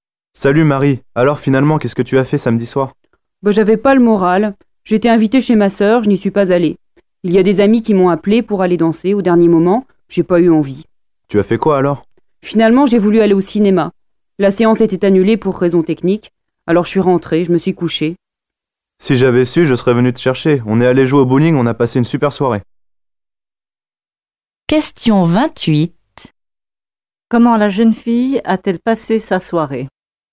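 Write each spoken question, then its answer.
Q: Comment la jeune fille a-t-elle passé sa soirée?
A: Elle est rentrée chez elle et s'est couchée.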